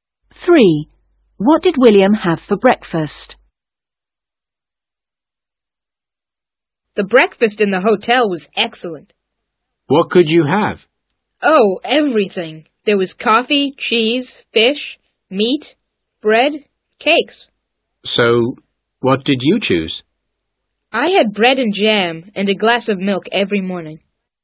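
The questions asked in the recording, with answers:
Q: What did William have for breakfast?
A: Bread and jam and a glass of milk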